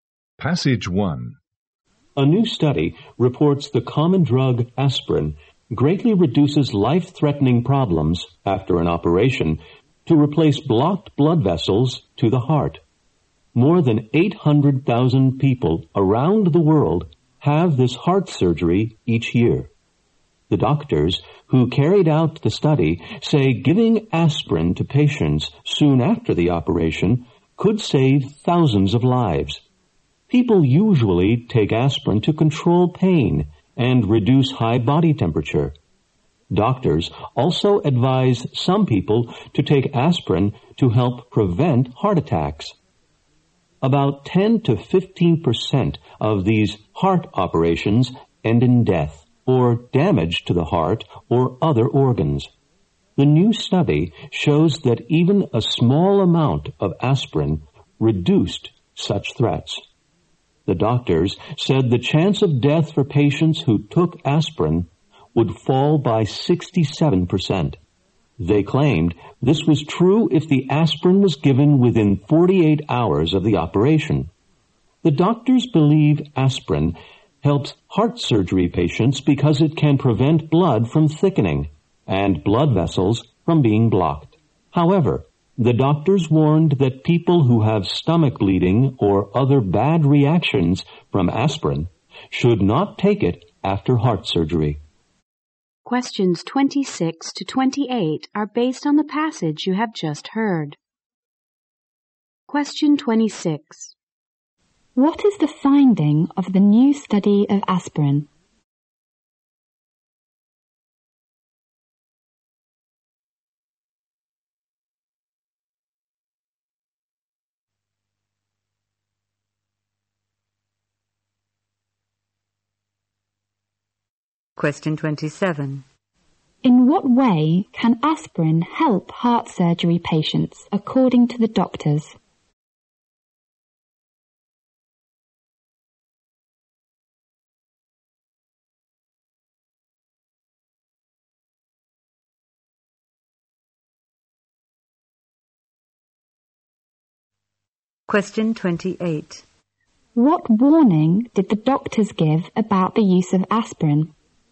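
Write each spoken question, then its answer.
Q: What is the finding of the new study of aspirin?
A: Aspirin greatly reduces life-threatening problems after heart bypass surgery

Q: In what way can aspirin help heart surgery patients, according to the doctors?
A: It prevents blood from thickening and blood vessels from being blocked

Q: What warning did the doctors give about the use of aspirin?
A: People with stomach bleeding or bad reactions to aspirin should not take it after surgery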